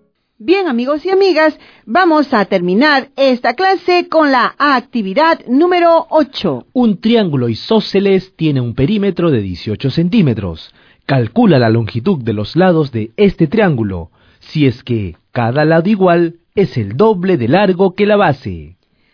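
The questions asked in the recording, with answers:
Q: Calcula la longitud de los lados de este triángulo, si es que cada lado igual es el doble de largo que la base.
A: Base 3,6 cm; cada lado igual 7,2 cm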